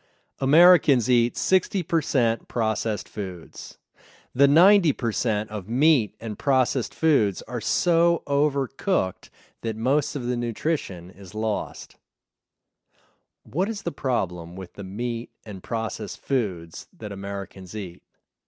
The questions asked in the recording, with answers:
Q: What is the problem with the meat and processed foods that Americans eat?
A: The meat and processed foods are so overcooked that most of the nutrition is lost.